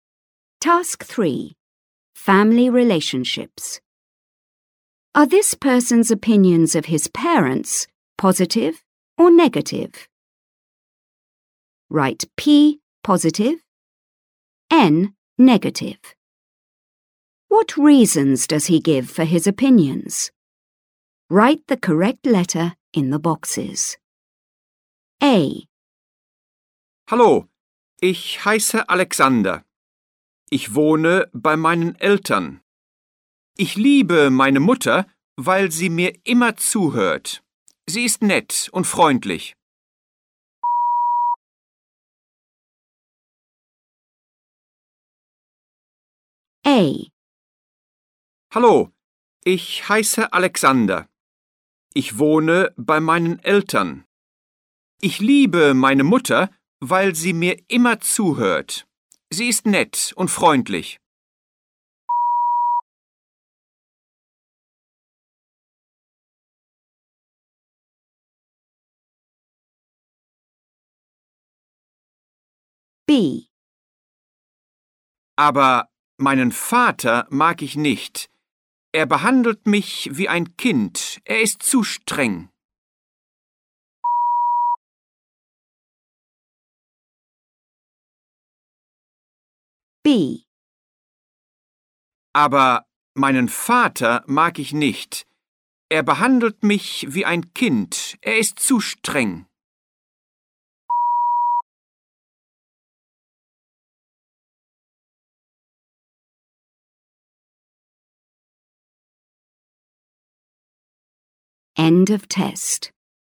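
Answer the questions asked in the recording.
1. Mother: positive (she always listens, she is nice and friendly)
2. Father: negative (he treats him like a child, he is too strict)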